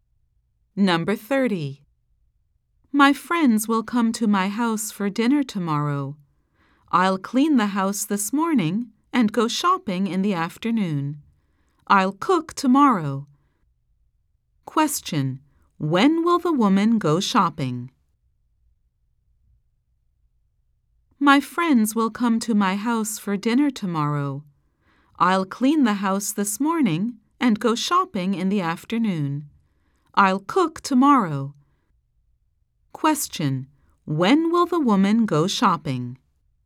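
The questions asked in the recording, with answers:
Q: When will the woman go shopping?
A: This afternoon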